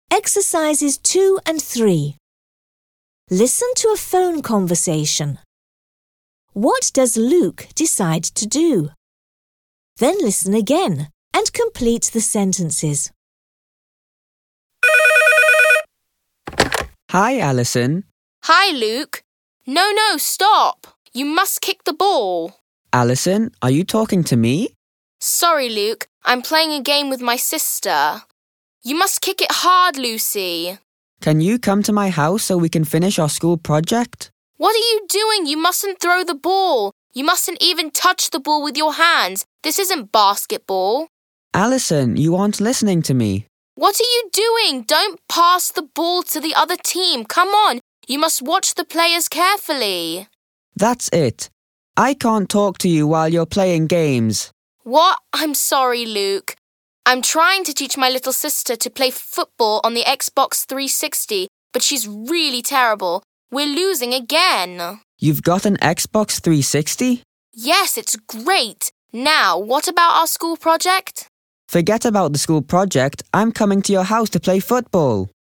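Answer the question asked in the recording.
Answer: Go to Alison's house to play football on the Xbox 360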